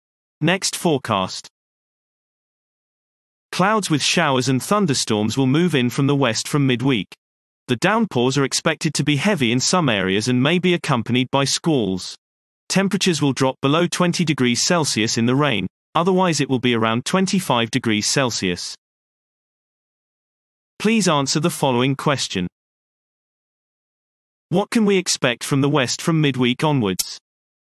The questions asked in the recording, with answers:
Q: What can we expect from the west from midweek onwards?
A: Clouds with showers and thunderstorms will move in from the west from midweek.